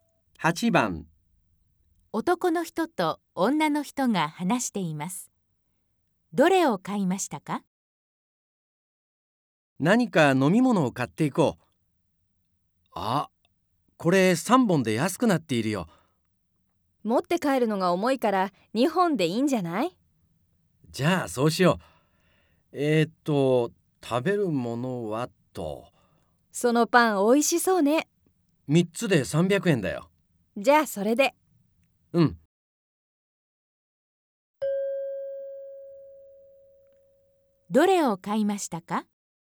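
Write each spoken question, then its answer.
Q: どれを買いましたか?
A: 飲み物2本とパン3つ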